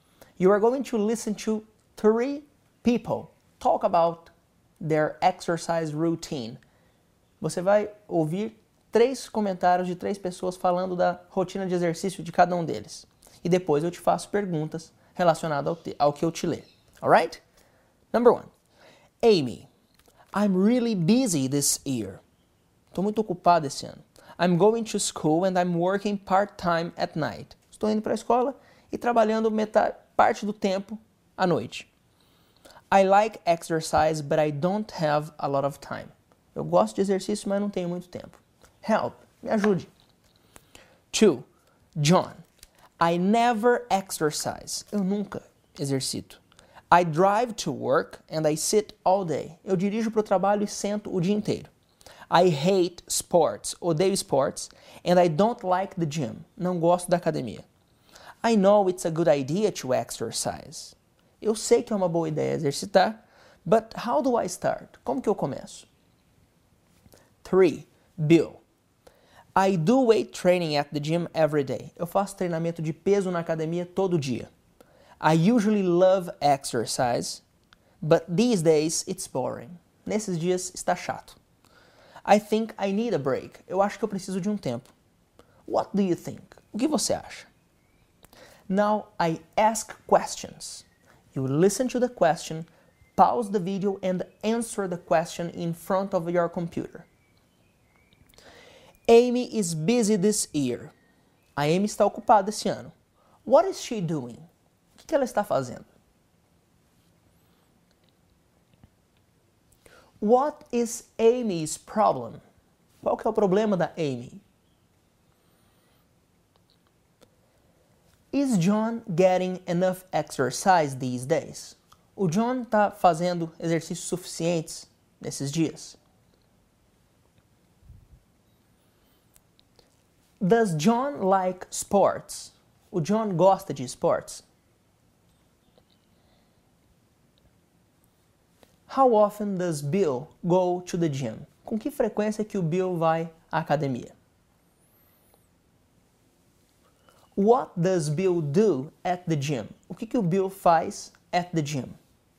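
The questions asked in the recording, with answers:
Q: What is she doing?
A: Going to school and working part-time at night

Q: What is Amy's problem?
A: She doesn't have a lot of time to exercise

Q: Is John getting enough exercise these days?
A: No, he never exercises

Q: Does John like sports?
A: No, he hates sports

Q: How often does Bill go to the gym?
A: Every day

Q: What does Bill do at the gym?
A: Weight training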